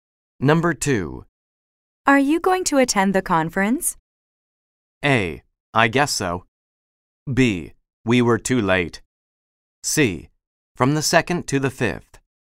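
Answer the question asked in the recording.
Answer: A: I guess so.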